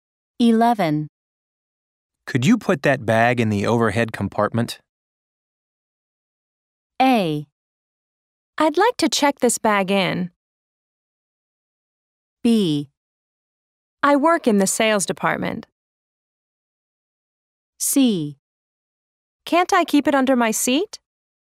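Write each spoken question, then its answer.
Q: Could you put that bag in the overhead compartment?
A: C: Can't I keep it under my seat?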